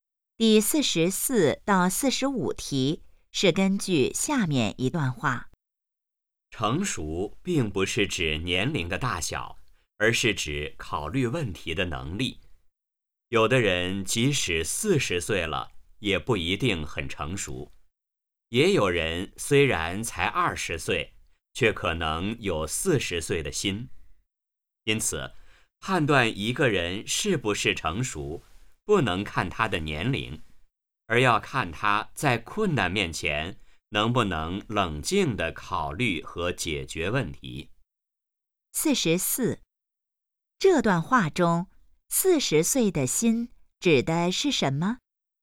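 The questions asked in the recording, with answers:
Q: 这段话中,40岁的心指的是什么?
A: 很成熟(考虑问题的能力强)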